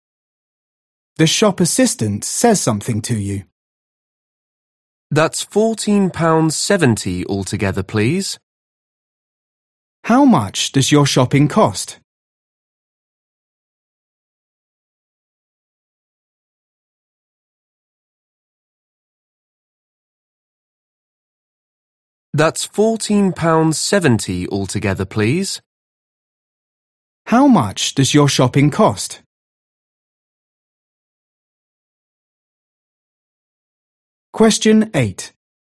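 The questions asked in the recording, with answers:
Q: How much does your shopping cost?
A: £14.70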